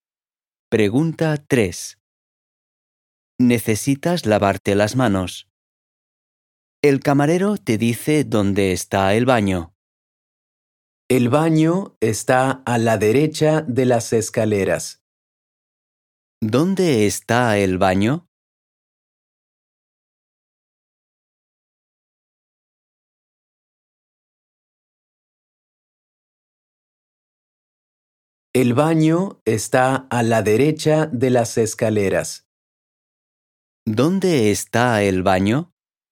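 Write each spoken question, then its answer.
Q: ¿Dónde está el baño?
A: A la derecha de las escaleras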